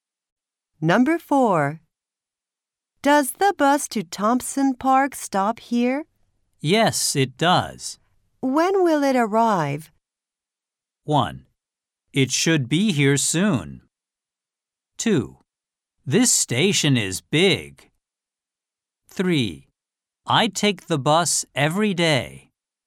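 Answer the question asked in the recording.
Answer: 1: It should be here soon.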